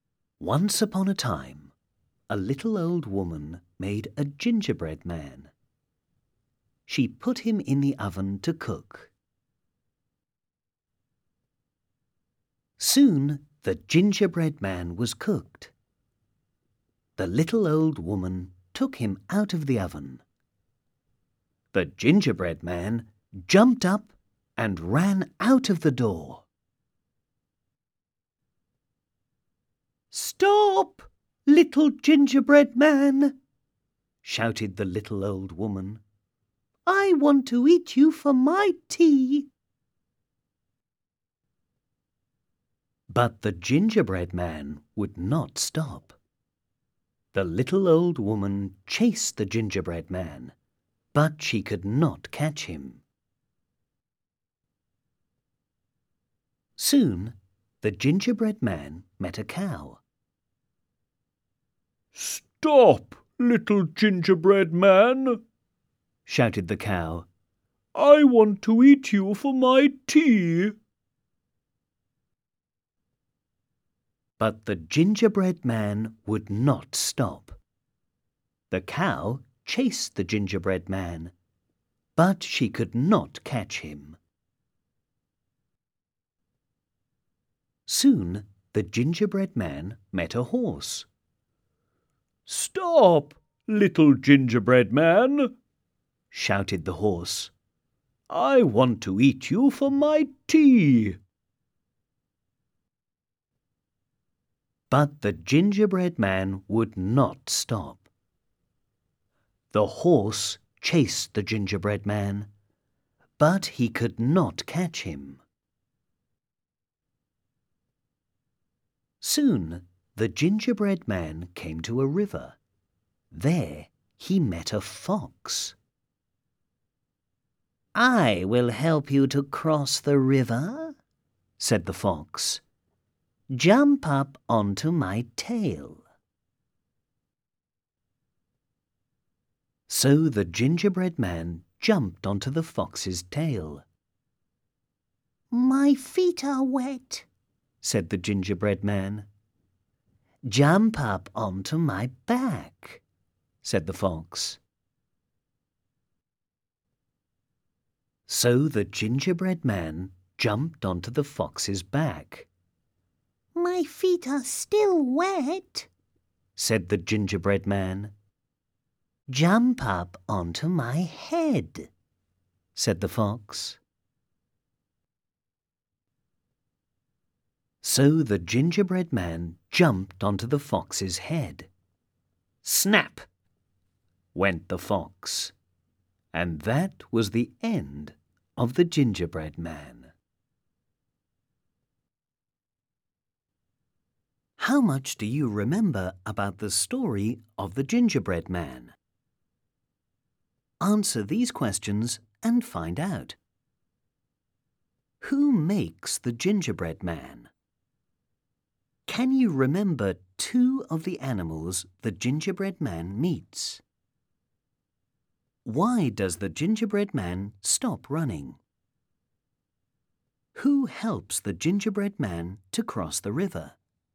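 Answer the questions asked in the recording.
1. A little old woman
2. A cow and a horse (also a fox)
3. He came to a river
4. A fox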